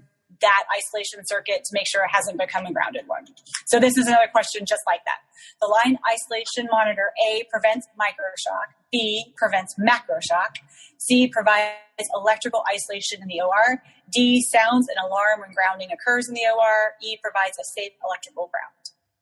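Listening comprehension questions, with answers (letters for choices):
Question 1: Line isolation monitor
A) Prevents microshock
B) Prevents macroshock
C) Provides electrical isolation in OR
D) Sounds alarm when grounding occurs in OR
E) Provides safe electrical ground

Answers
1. D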